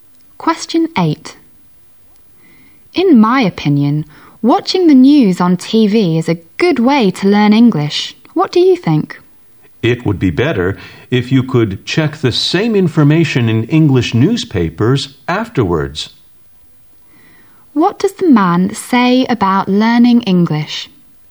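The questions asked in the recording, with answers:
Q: What does the man say about learning English?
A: It's better to also check the same news in English newspapers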